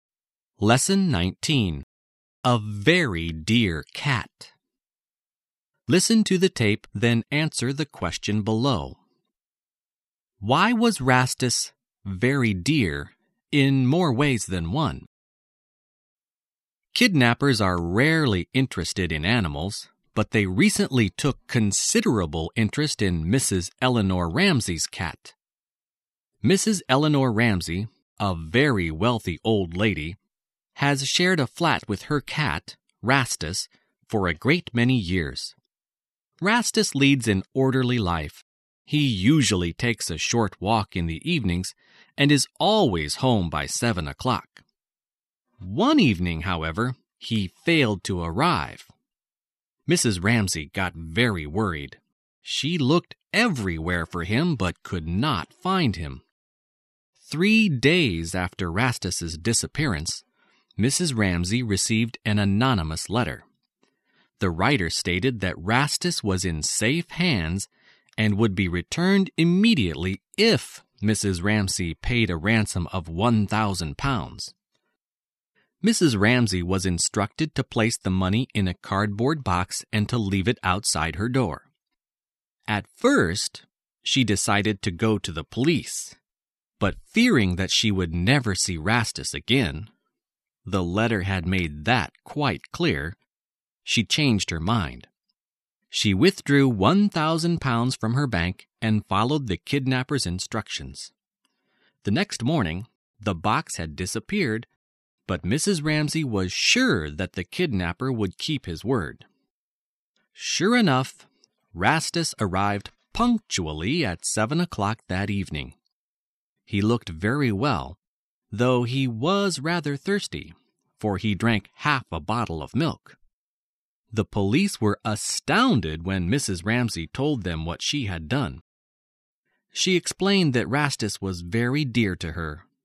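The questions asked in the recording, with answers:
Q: Why was Rastus very dear in more ways than one?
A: Mrs. Ramsey loved him very much, and she paid a ransom of £1,000 to get him back.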